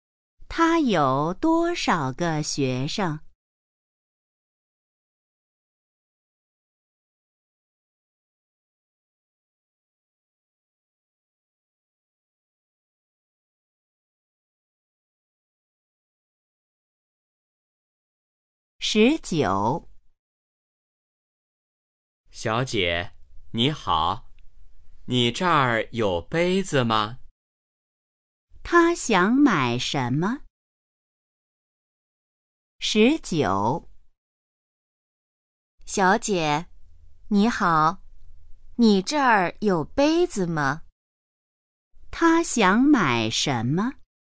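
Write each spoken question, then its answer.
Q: 他想买什么?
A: 杯子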